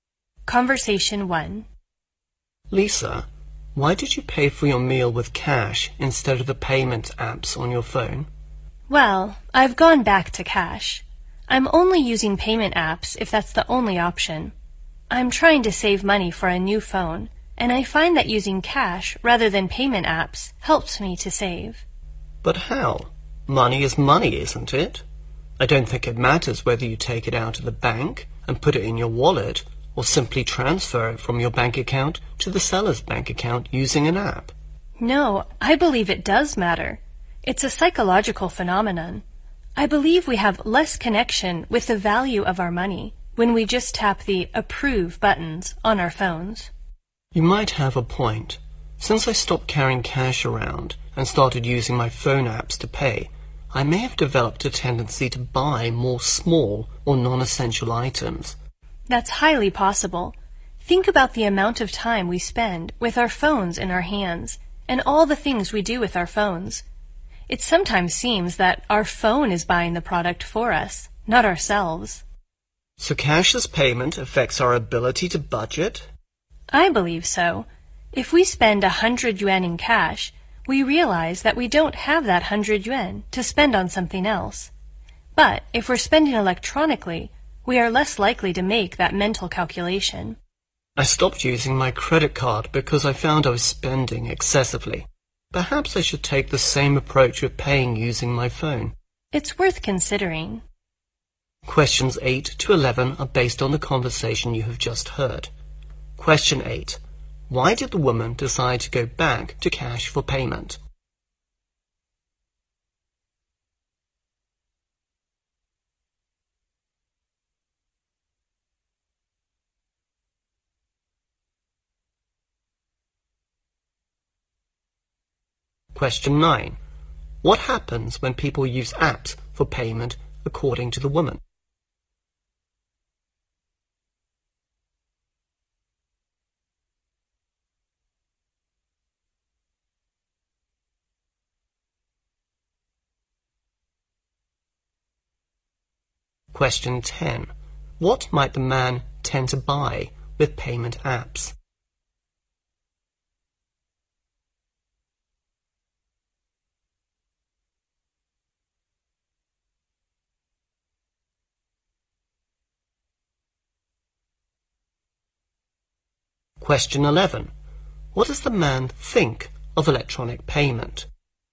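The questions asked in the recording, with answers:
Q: Why did the woman decide to go back to cash for payment?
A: To save money for a new phone

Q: What happens when people use apps for payment according to the woman?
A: They have less connection with the value of their money

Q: What might the man tend to buy with payment apps?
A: Small or non-essential items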